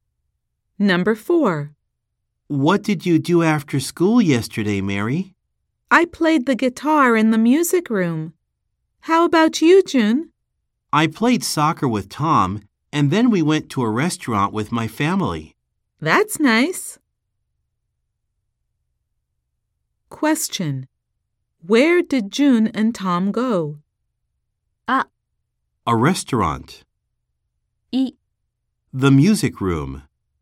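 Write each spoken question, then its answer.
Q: Where did June and Tom go?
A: A restaurant.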